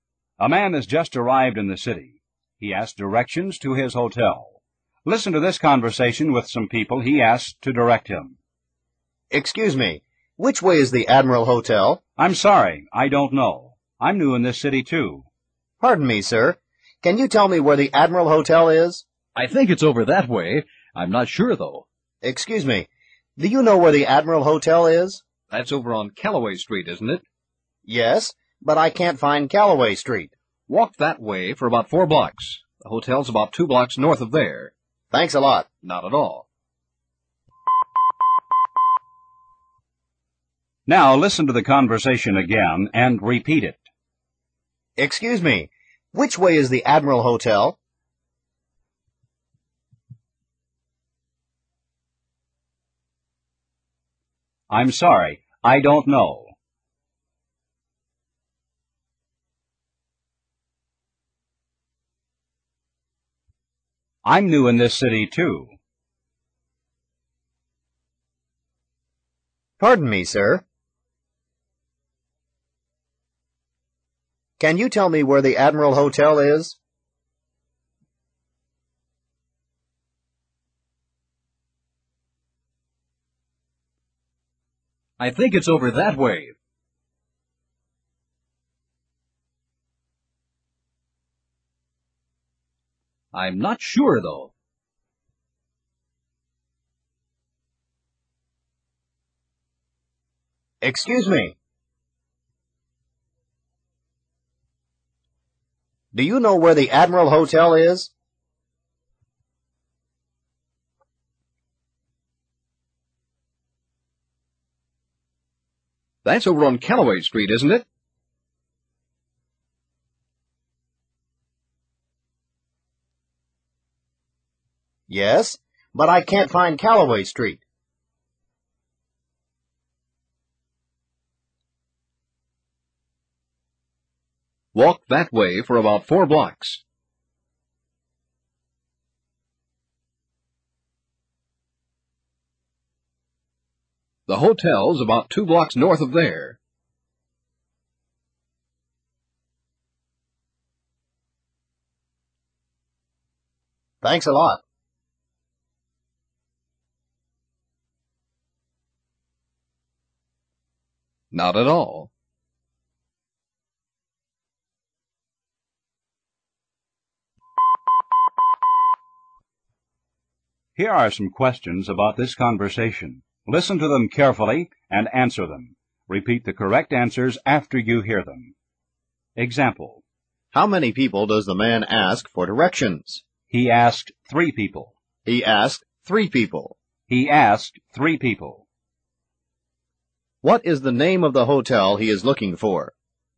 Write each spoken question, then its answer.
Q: What is the name of the hotel he is looking for?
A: He is looking for the Admiral Hotel.